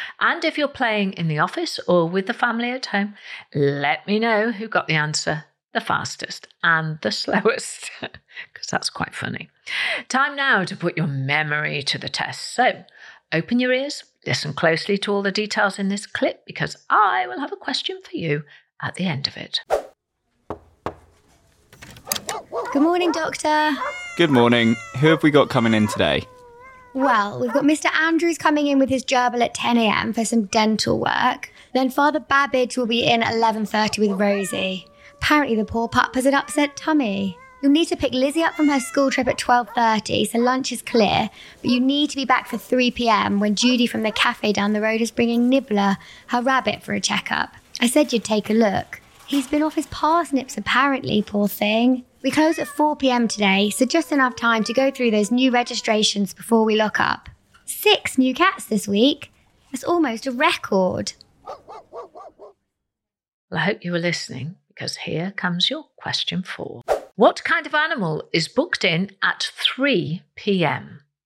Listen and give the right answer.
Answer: The answer was the rabbit.